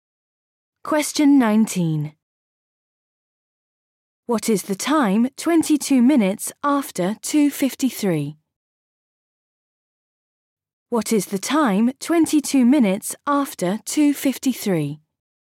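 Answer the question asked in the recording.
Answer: 3:15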